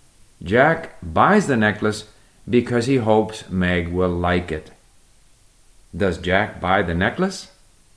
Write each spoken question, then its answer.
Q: Does Jack buy the necklace?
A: Yes, Jack buys the necklace because he hopes Meg will like it.